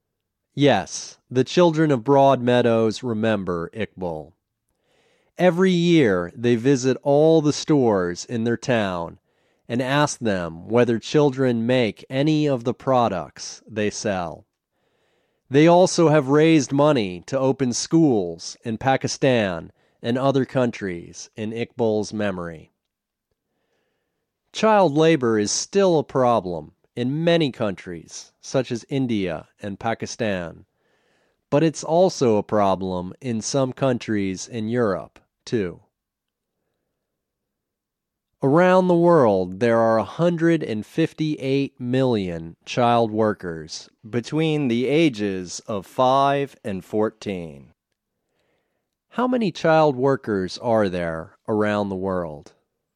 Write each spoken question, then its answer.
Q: How many child workers are there around the world?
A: There are 158 million child workers around the world.